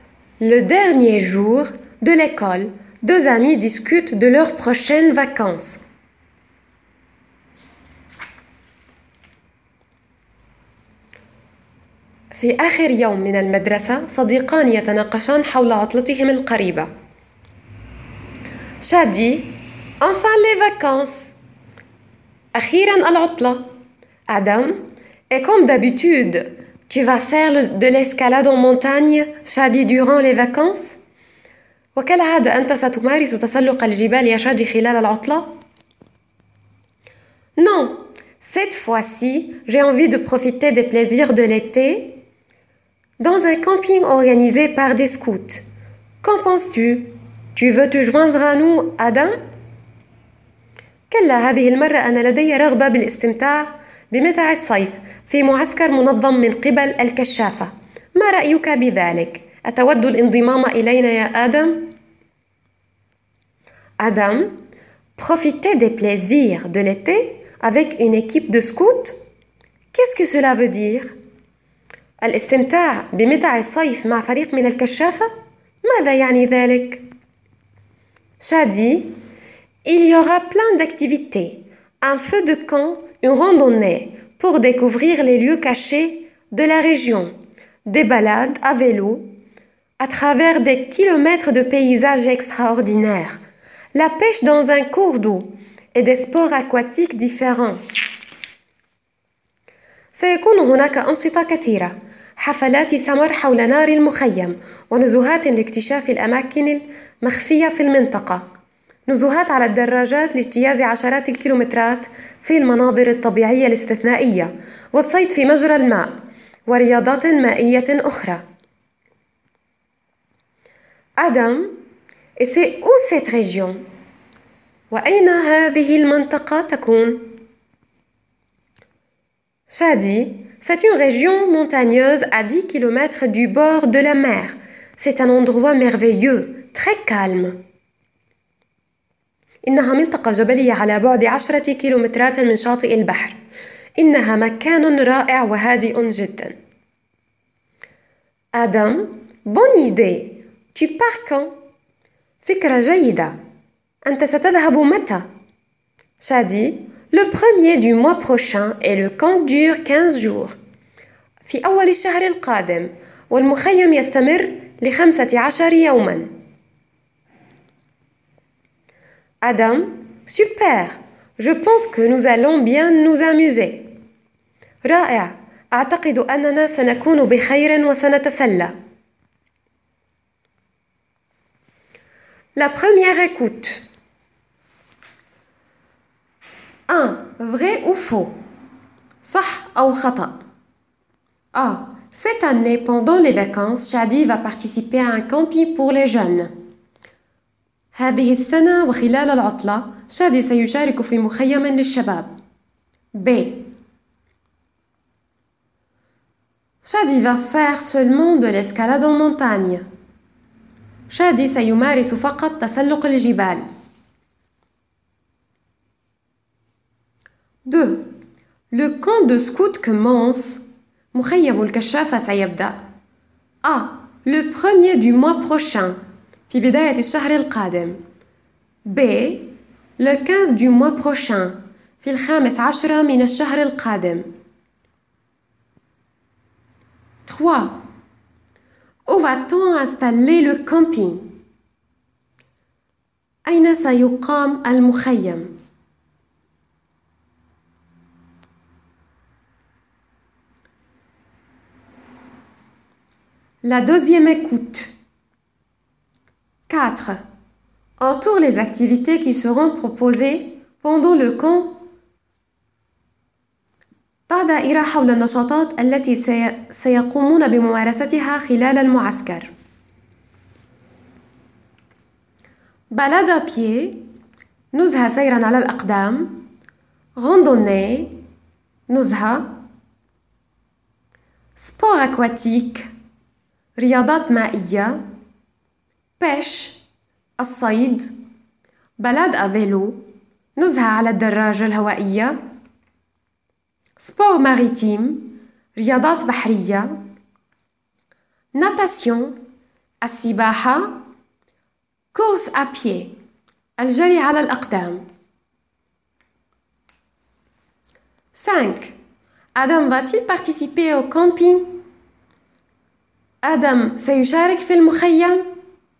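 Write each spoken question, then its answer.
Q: Cette année, pendant les vacances, Shadi va participer à un camping pour les jeunes.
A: Vrai

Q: Shadi va faire seulement de l'escalade en montagne.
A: Faux

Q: Le camp de scout commence...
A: A: Le premier du mois prochain

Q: Où va-t-on installer le camping?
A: Dans une région montagneuse à 10 km du bord de la mer

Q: Adam va-t-il participer au camping?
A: Oui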